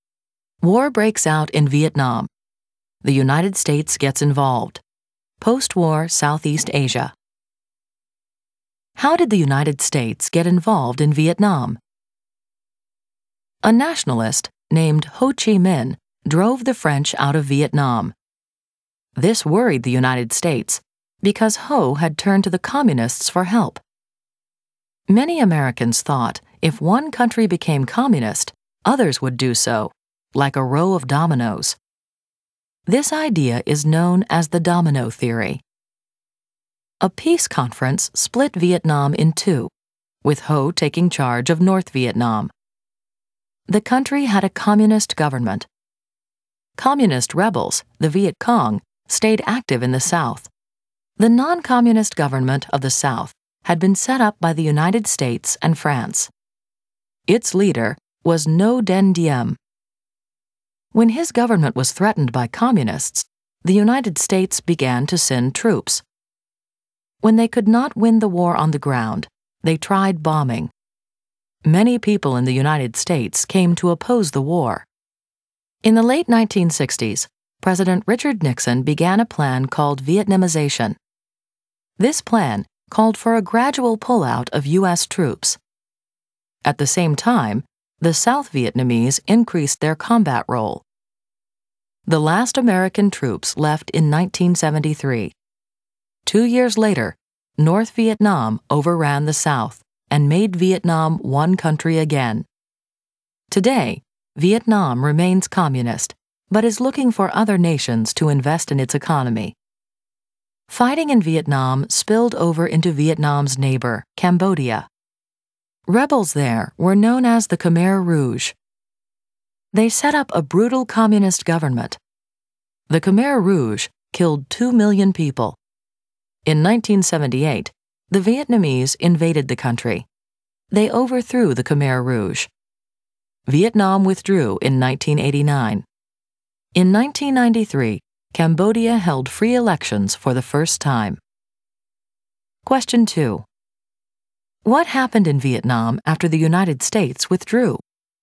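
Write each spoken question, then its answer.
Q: What happened in Vietnam after the United States withdrew?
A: North Vietnam overran the South and reunited Vietnam as one communist country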